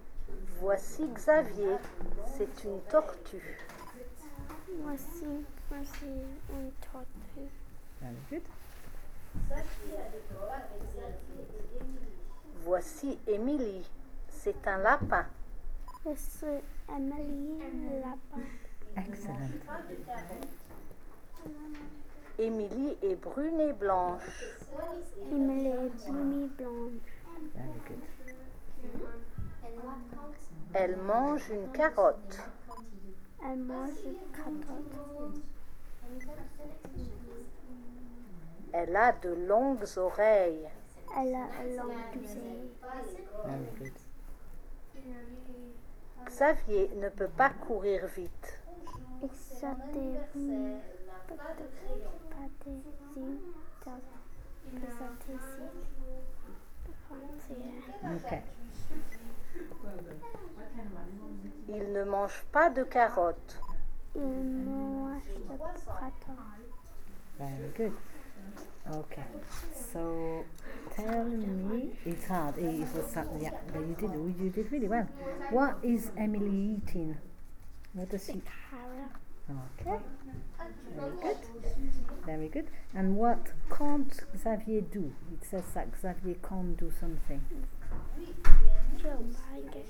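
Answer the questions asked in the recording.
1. A carrot
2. Run fast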